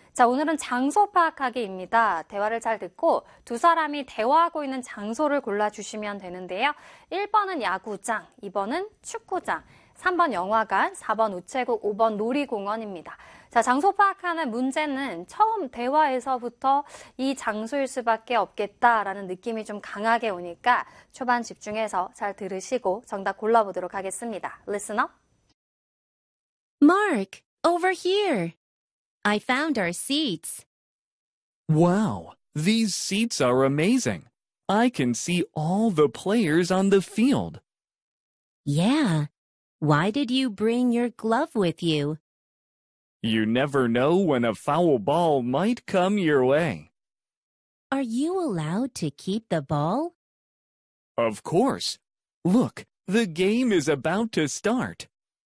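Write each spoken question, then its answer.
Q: 대화를 잘 듣고 두 사람이 대화하고 있는 장소를 골라주시면 되는데요.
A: 1: 야구장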